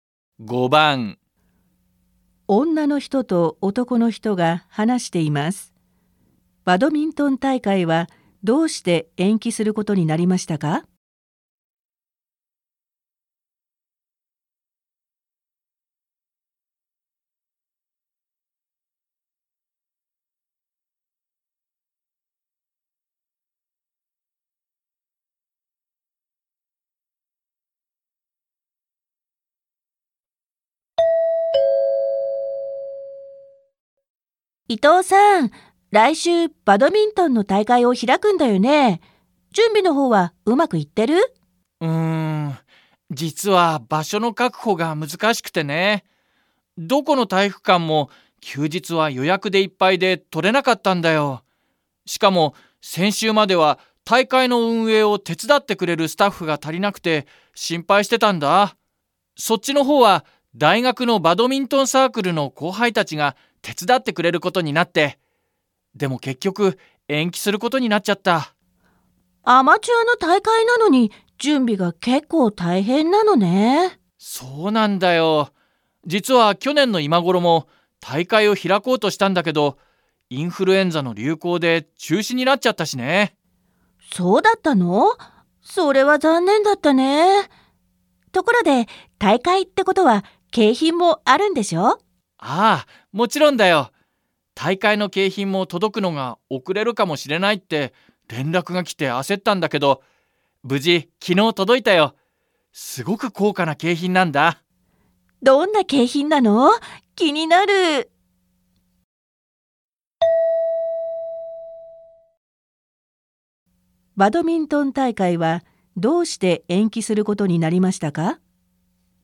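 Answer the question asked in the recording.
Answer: 場所(体育館)が確保できなかったから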